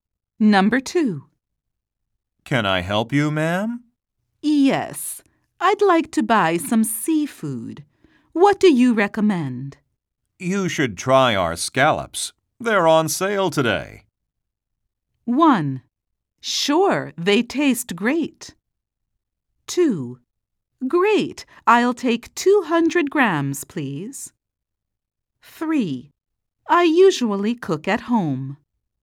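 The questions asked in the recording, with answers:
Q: You should try our scallops. They're on sale today.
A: 2: Great, I'll take 200 grams, please.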